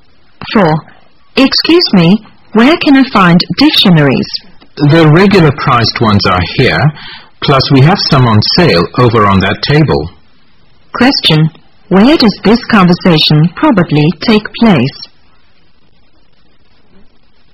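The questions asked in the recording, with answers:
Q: Where does this conversation probably take place?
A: In a bookstore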